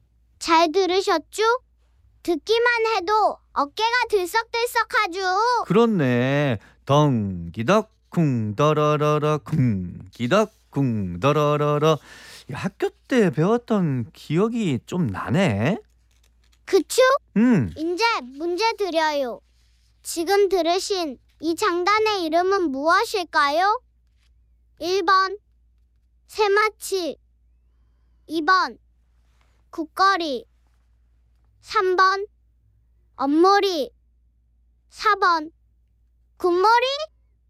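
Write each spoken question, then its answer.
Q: 지금 들으신 이 장단의 이름은 무엇일까요?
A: 2번: 국거리 (굿거리)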